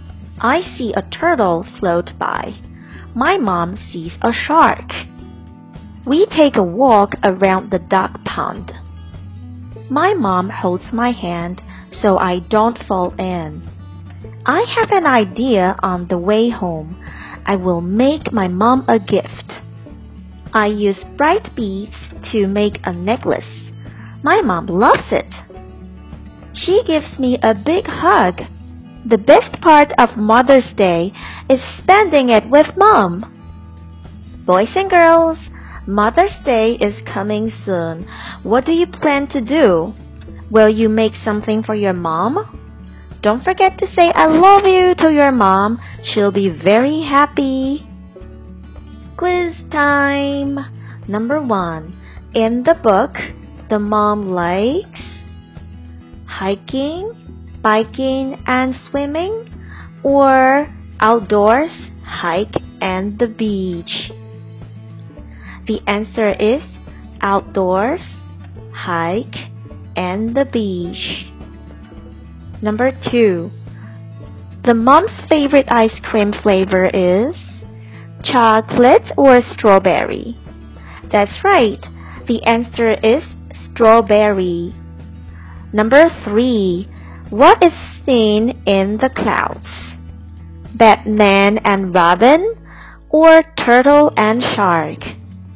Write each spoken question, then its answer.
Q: what is seen in the clouds?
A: The answer is turtle and shark.